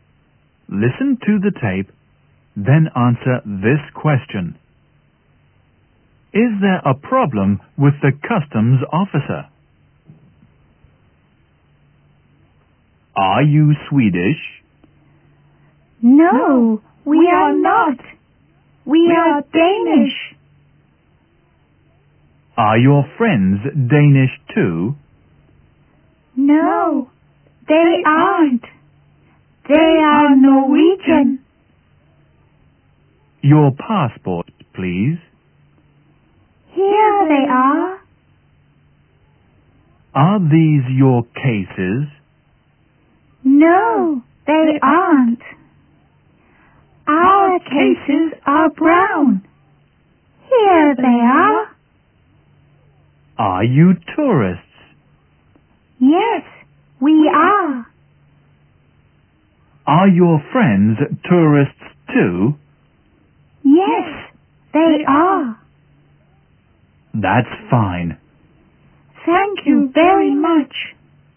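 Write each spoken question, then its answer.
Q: Is there a problem with the customs officer?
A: No, there isn't. Everything is fine.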